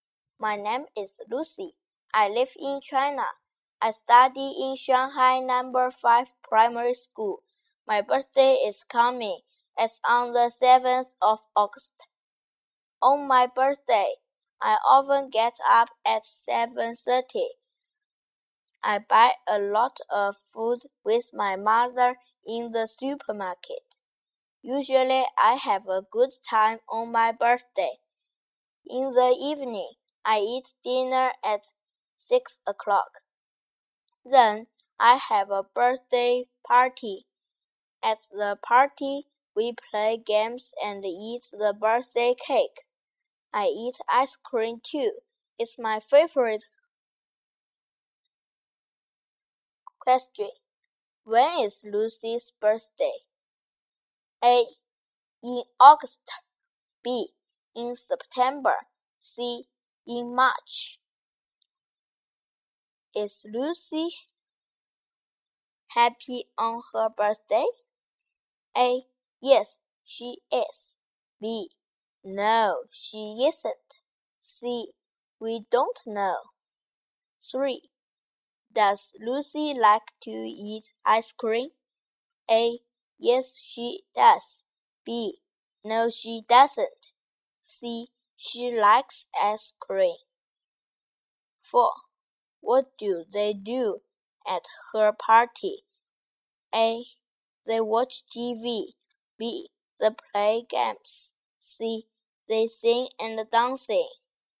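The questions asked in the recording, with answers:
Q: When is Lucy's birthday?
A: A: In August.

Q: Is Lucy happy on her birthday?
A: A: Yes, she is.

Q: Does Lucy like to eat ice cream?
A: A: Yes, she does.

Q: What do they do at her party?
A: B: They play games.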